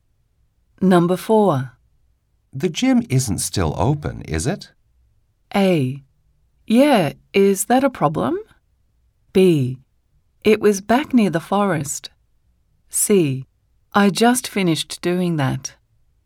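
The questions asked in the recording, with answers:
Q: The gym isn't still open, is it?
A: A: Yeah, is that a problem?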